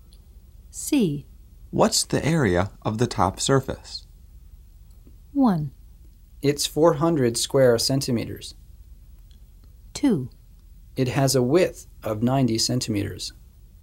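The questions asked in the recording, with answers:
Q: What's the area of the top surface?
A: 1: It's 400 square centimeters.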